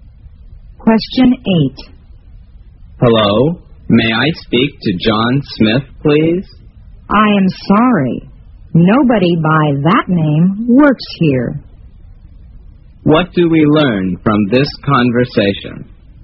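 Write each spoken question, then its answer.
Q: What do we learn from this conversation?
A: The caller has the wrong number; no John Smith works there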